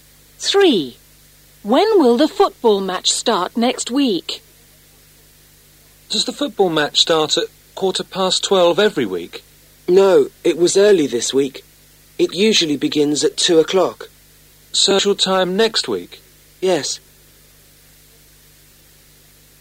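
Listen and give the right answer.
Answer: At 2 o'clock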